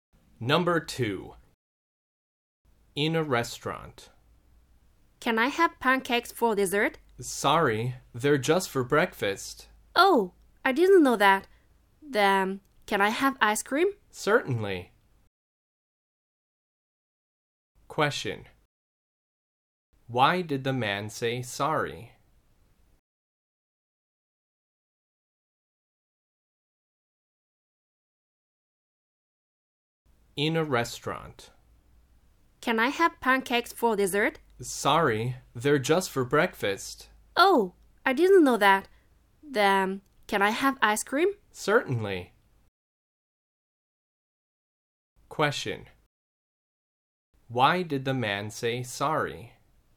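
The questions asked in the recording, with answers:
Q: Why did the man say sorry?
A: Because pancakes are only served at breakfast.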